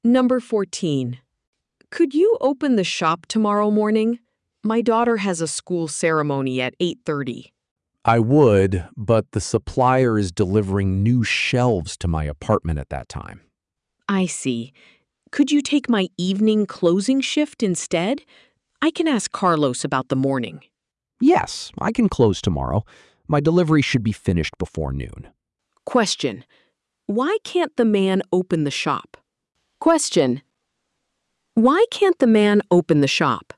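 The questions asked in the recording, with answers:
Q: Why can't the man open the shop?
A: A supplier is delivering new shelves to his apartment at that time.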